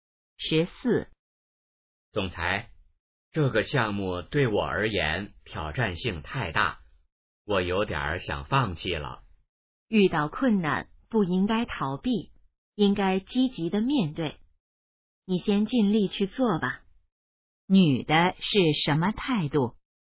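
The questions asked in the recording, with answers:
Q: 女的是什么态度?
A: 鼓励他积极面对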